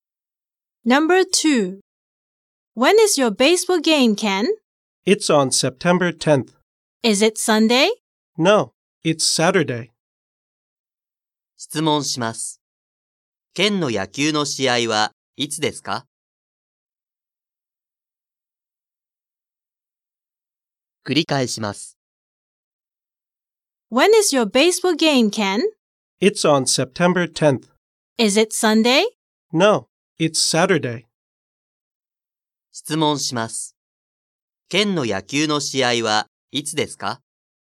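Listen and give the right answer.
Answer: 9月10日の土曜日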